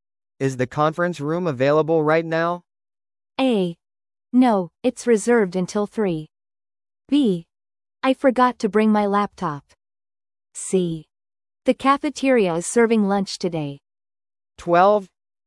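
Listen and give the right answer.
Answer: A: No, it's reserved until 3.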